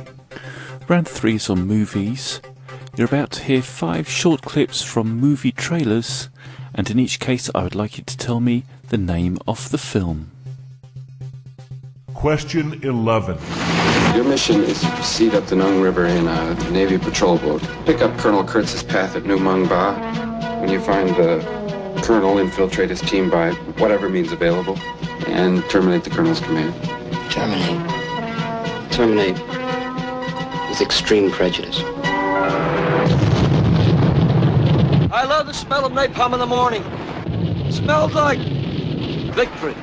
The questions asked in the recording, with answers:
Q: in each case I would like you to tell me the name of the film.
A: the answer to number 11 was Apocalypse Now